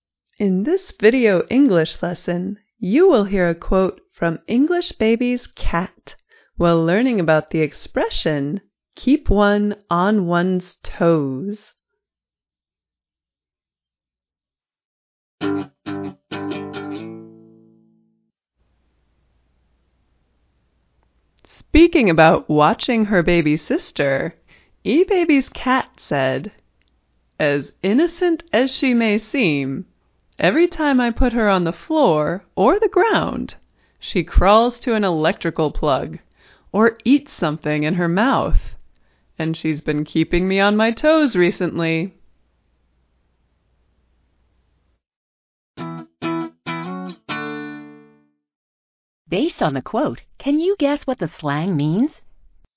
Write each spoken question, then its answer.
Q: Based on the quote, can you guess what the slang means?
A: Keep one on one's toes is an expression meaning require a person to be alert, need to be watched all the time.